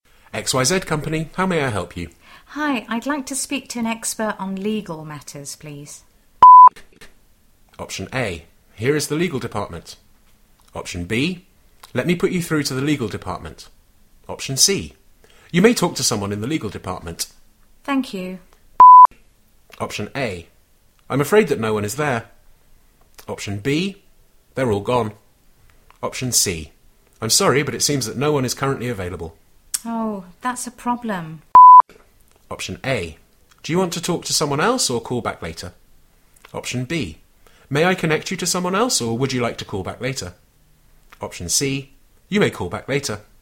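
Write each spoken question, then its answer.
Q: Thank you.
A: C: I'm sorry, but it seems that no one is currently available.

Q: Oh, that's a problem.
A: B: May I connect you to someone else or would you like to call back later?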